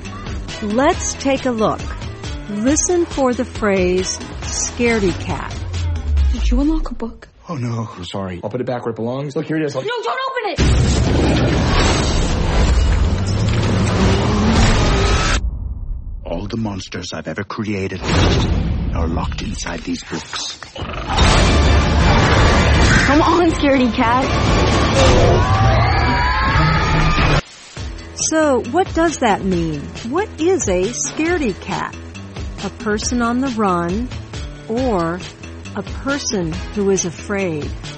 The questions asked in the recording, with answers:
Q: What is a scaredy cat?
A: A scaredy cat is a person who is very afraid.